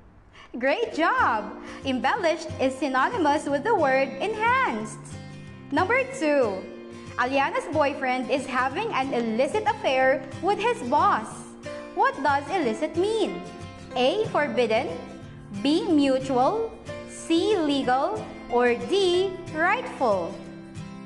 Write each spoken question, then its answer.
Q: What does illicit mean?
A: Illicit is synonymous with the term forbidden.